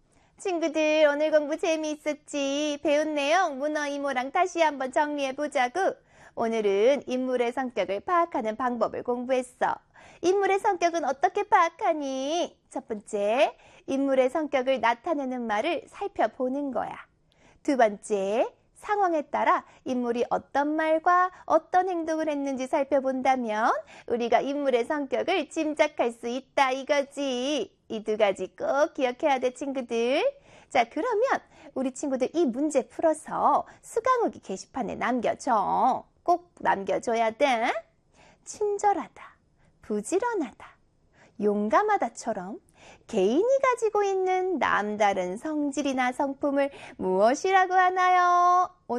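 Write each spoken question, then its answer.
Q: 친절하다, 부지런하다, 용감하다처럼 개인이 가지고 있는 남다른 성질이나 성품을 무엇이라고 하나요?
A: 성격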